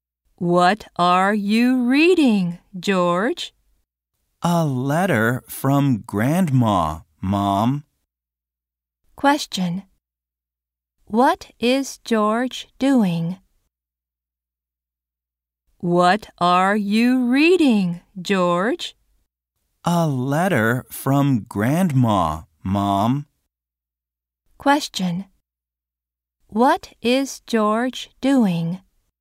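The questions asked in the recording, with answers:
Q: What is George doing?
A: Reading a letter from Grandma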